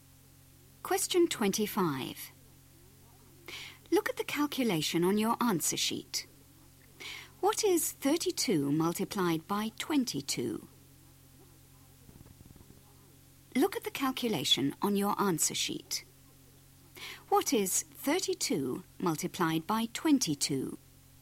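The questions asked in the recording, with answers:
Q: What is 32 multiplied by 22?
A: 704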